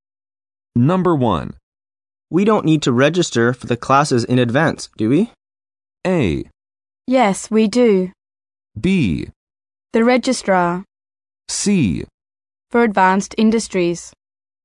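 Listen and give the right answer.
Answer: A: Yes, we do.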